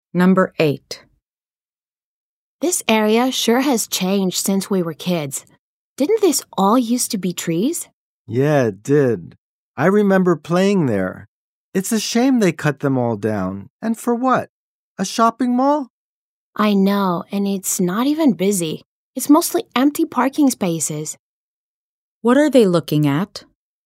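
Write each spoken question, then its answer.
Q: What are they looking at?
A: A shopping mall built where trees used to be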